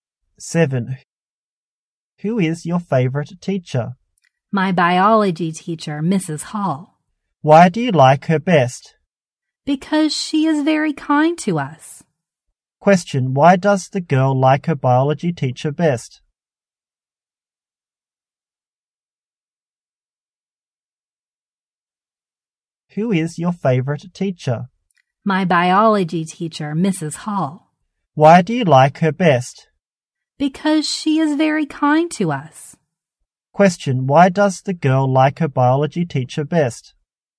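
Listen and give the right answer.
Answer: Because she is very kind to them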